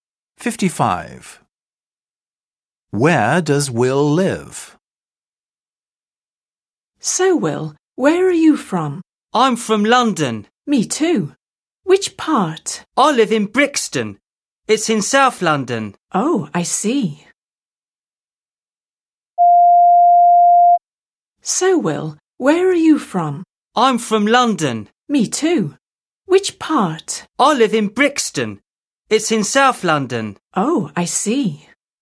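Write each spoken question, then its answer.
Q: Where does Will live?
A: Brixton, South London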